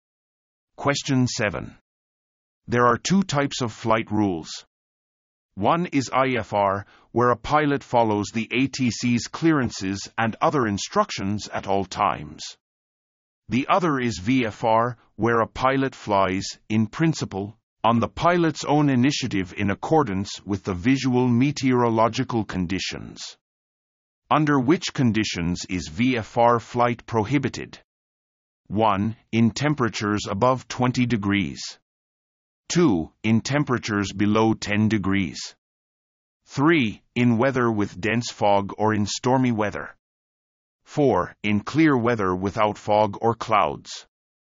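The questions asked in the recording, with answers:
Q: Under which conditions is VFR flight prohibited?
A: 3: In weather with dense fog or in stormy weather.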